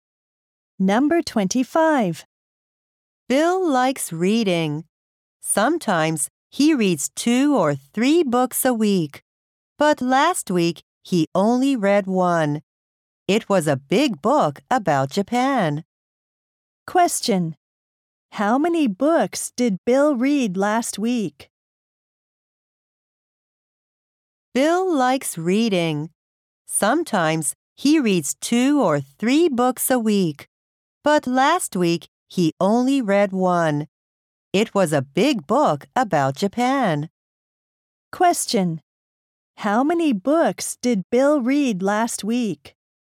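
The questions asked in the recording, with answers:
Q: How many books did Bill read last week?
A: One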